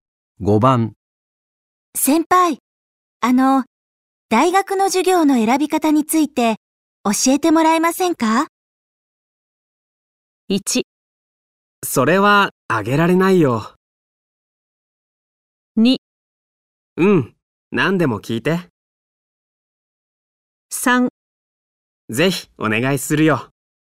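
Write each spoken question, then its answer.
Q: 先輩、大学の授業の選び方について教えてもらえませんか?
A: 2: うん、何でも聞いて。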